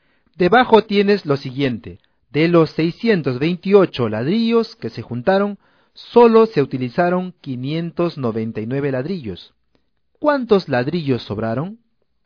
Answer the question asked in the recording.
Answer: 29.